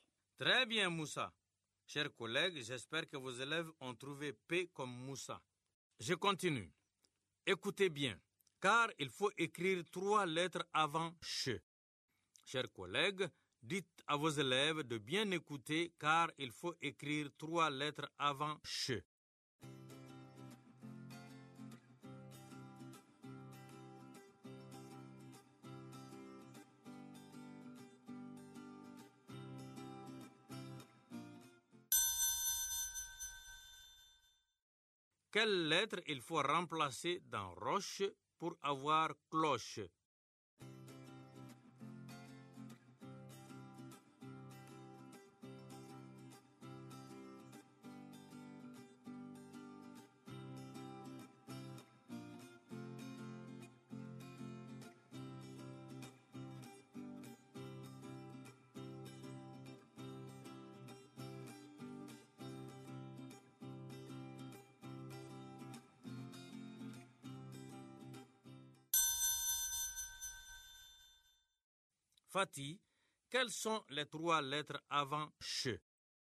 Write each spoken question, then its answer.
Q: Fatih, quelles sont les trois lettres avant ch?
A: Monsieur, ce sont C, L et O.